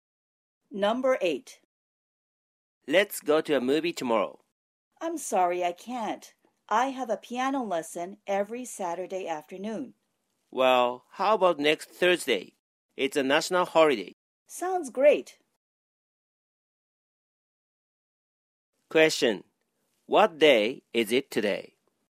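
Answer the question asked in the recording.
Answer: Friday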